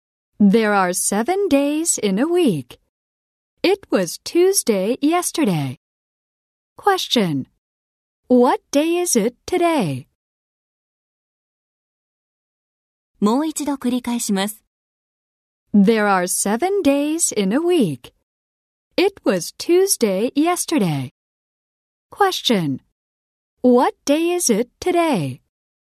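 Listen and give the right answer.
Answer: Wednesday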